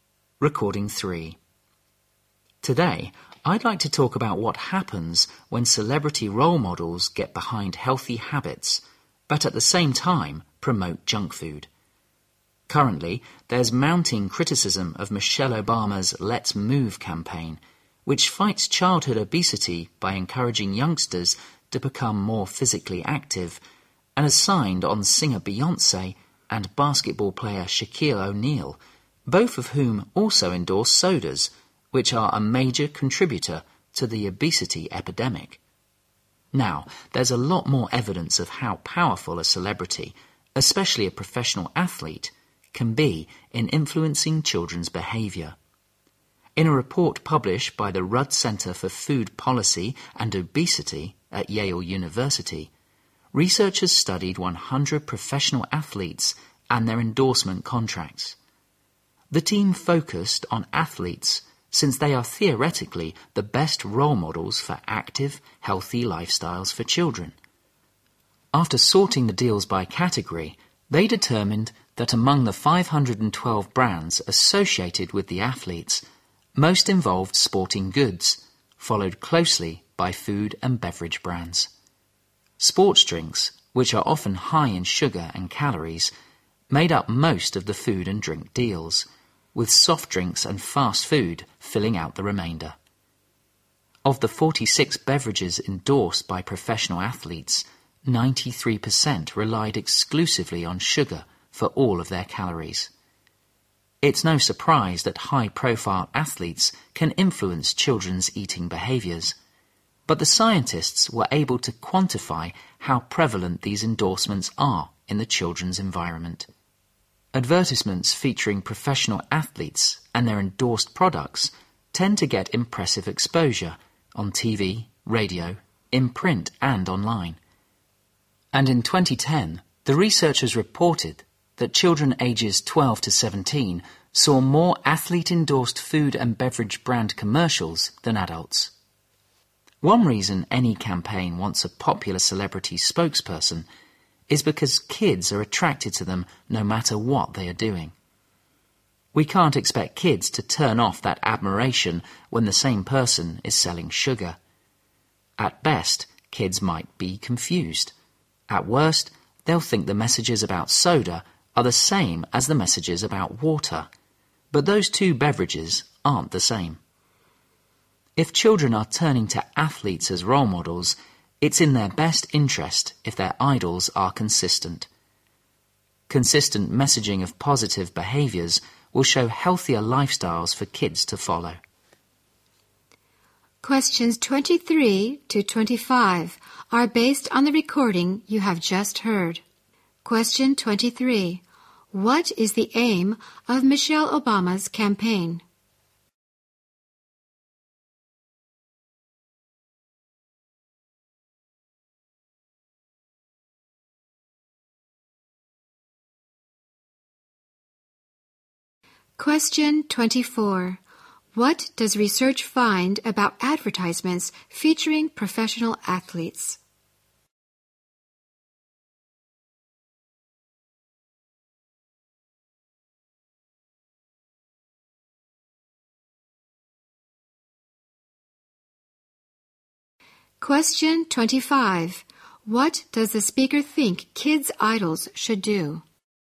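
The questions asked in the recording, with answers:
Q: What is the aim of Michelle Obama's campaign?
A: To fight childhood obesity by making children more active.

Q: What does the speaker think kids' idols should do?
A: Be consistent in promoting positive, healthy behaviour.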